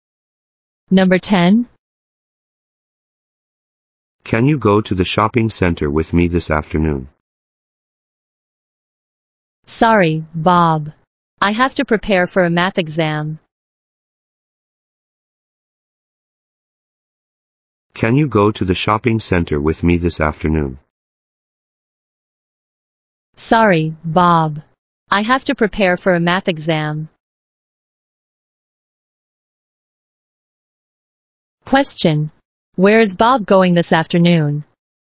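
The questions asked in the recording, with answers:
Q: Where is Bob going this afternoon?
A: To the shopping center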